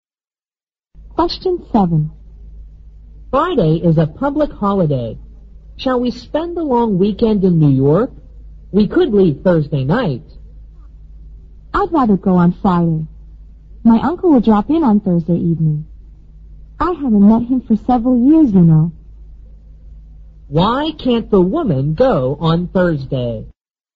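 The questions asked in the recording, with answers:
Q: Why can't the woman go on Thursday?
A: Her uncle is visiting Thursday evening.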